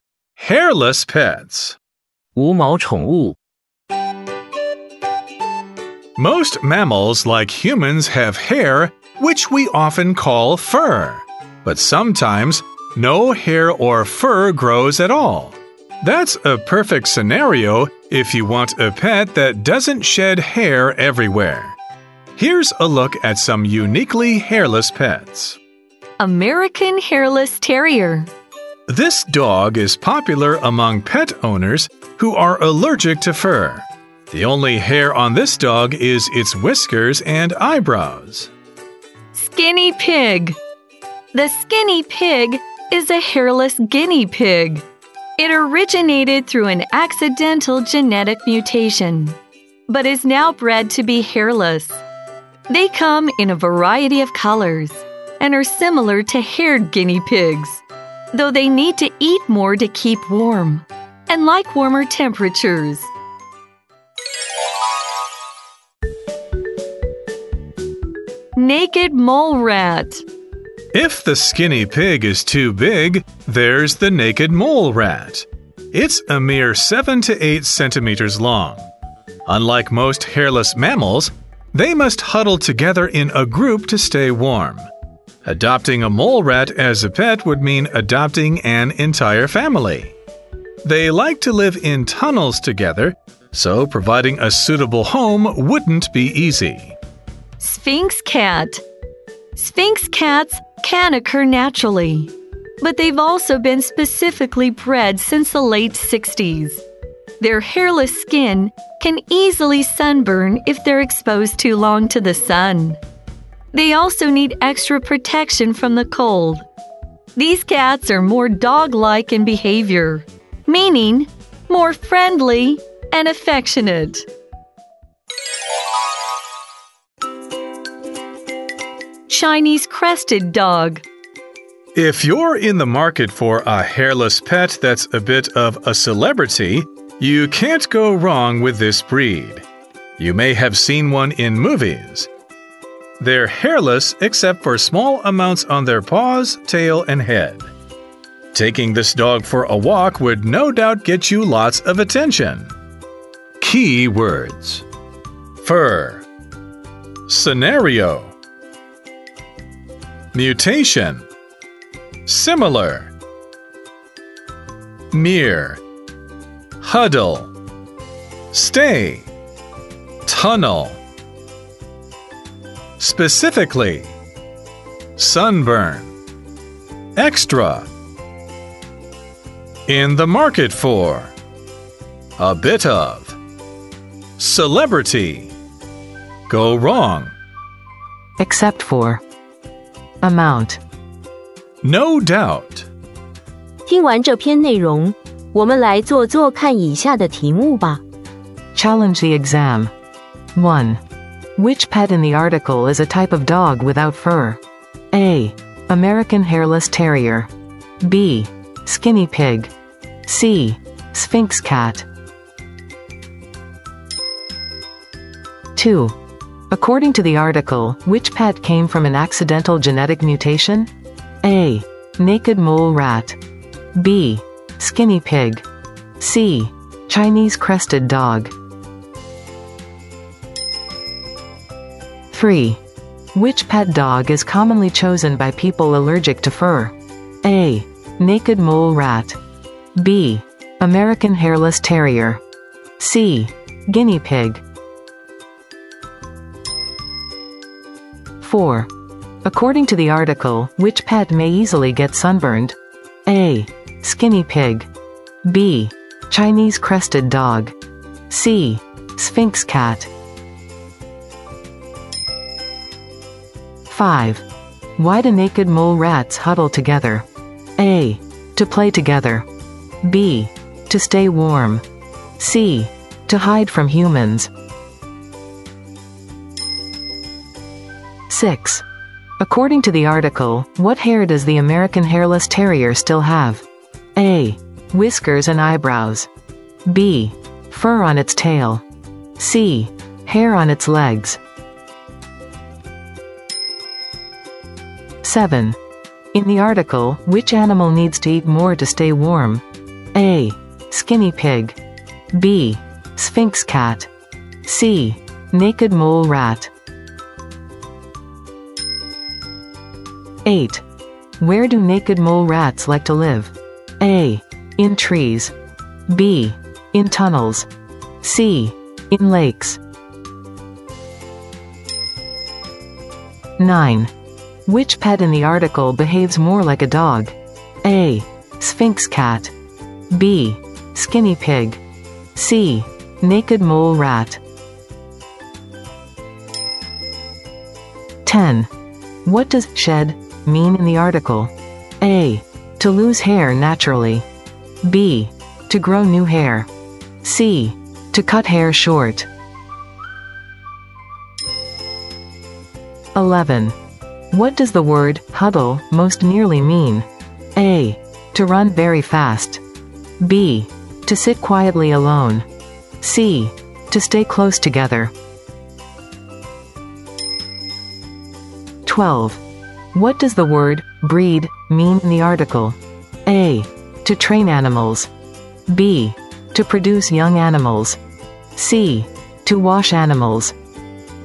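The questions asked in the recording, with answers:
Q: Which pet in the article is a type of dog without fur?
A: A: American Hairless Terrier.

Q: According to the article, which pet came from an accidental genetic mutation?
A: B: Skinny Pig.

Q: Which pet dog is commonly chosen by people allergic to fur?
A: B: American Hairless Terrier.

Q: According to the article, which pet may easily get sunburned?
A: C: Sphinx Cat.

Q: Why do naked mole rats huddle together?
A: B: To stay warm.

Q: According to the article, what hair does the American hairless terrier still have?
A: A: Whiskers and eyebrows.

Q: In the article, which animal needs to eat more to stay warm?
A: A: Skinny pig.

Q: Where do naked mole rats like to live?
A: B: In tunnels.

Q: Which pet in the article behaves more like a dog?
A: A: Sphinx cat.

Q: What does shed mean in the article?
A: A: To lose hair naturally.

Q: What does the word huddle most nearly mean?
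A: C: To stay close together.

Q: What does the word breed mean in the article?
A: B: To produce young animals.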